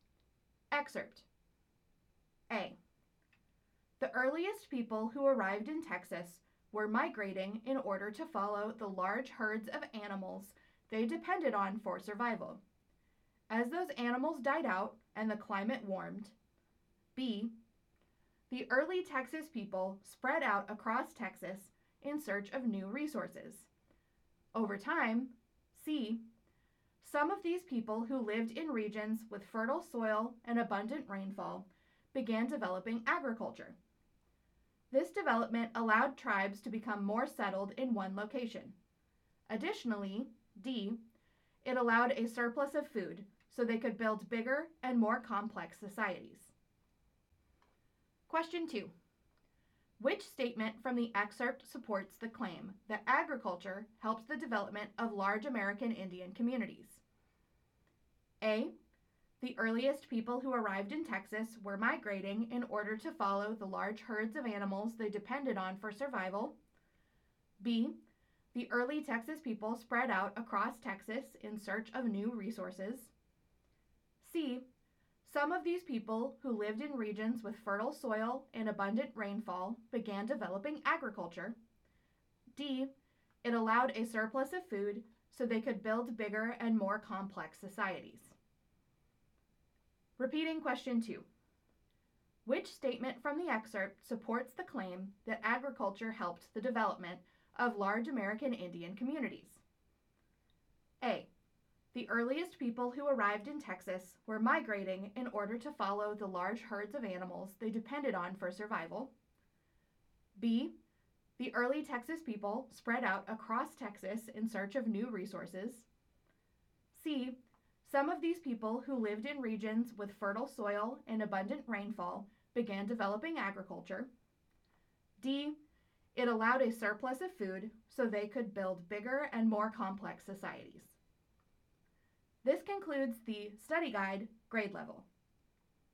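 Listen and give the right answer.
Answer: D: It allowed a surplus of food so they could build bigger and more complex societies.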